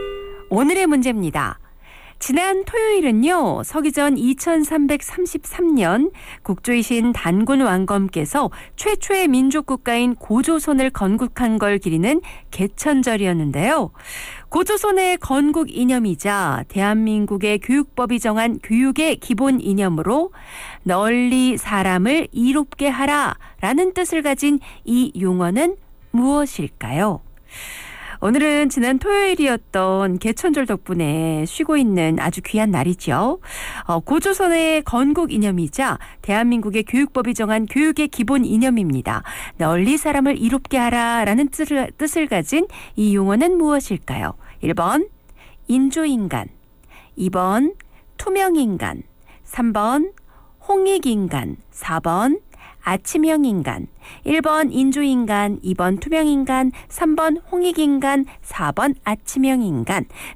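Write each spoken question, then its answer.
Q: 고조선의 건국 이념이자 대한민국의 교육법이 정한 교육의 기본 이념으로 널리 사람을 이롭게 하라 라는 뜻을 가진 이 용어는 무엇일까요?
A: 3: 홍익인간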